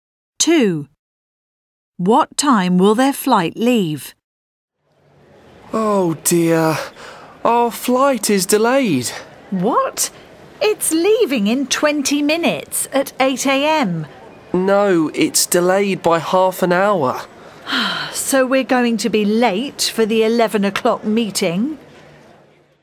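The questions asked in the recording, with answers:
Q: What time will their flight leave?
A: 8:30 a.m.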